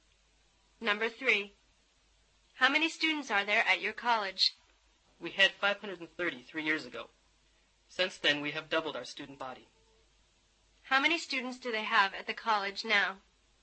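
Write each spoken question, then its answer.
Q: How many students do they have at the college now?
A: 1,060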